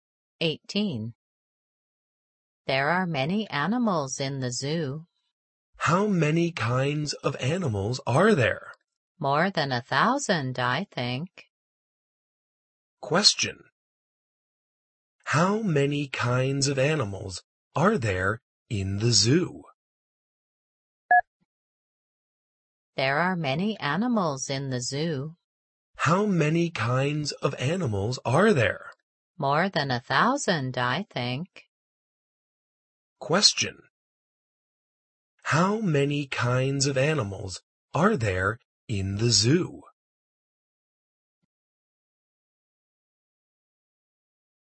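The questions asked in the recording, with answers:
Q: How many kinds of animals are there in the zoo?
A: More than 1,000.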